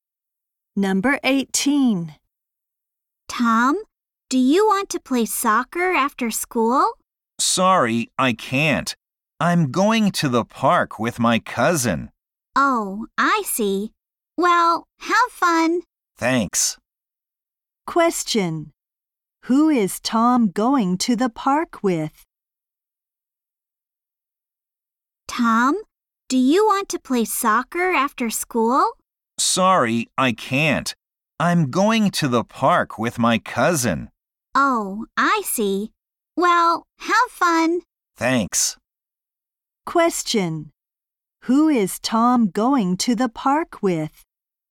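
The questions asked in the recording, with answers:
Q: Who is Tom going to the park with?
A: His cousin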